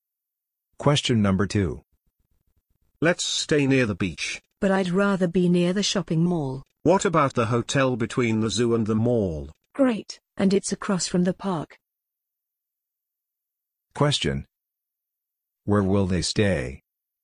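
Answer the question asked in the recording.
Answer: At the hotel between the zoo and the mall, across from the park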